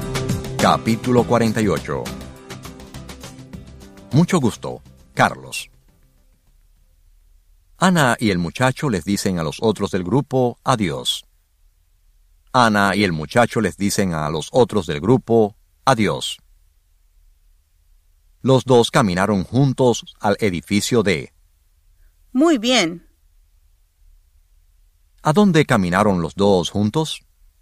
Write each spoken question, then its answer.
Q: ¿A dónde caminaron los dos juntos?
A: Ellos caminaron juntos al edificio D.